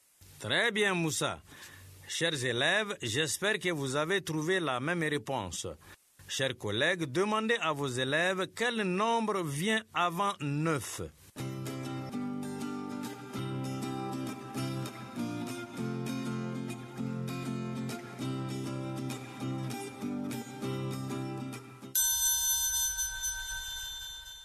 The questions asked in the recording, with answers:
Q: Chers collègues, demandez à vos élèves quel nombre vient avant 9.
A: Monsieur, c'est 8.